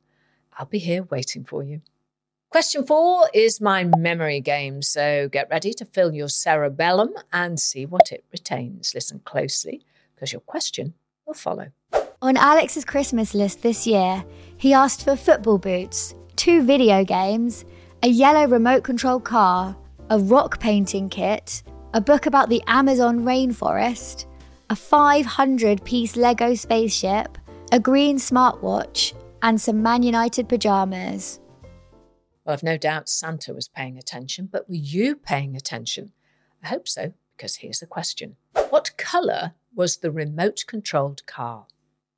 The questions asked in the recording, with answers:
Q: What colour was the remote-controlled car?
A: And the answer was yellow.